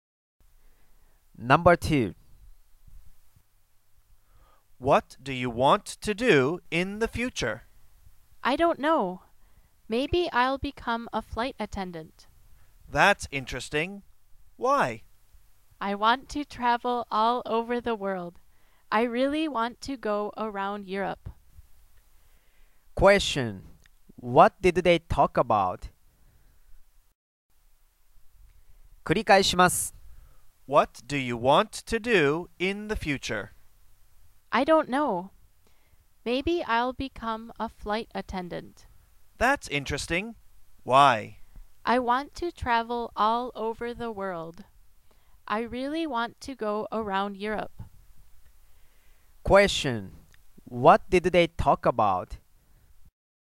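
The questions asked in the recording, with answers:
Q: What did they talk about?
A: What they want to do in the future (becoming a flight attendant).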